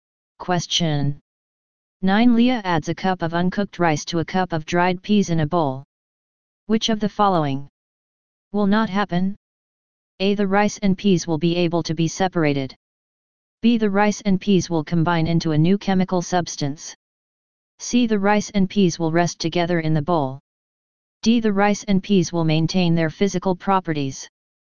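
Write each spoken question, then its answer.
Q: Which of the following will not happen?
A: B: The rice and peas will combine into a new chemical substance.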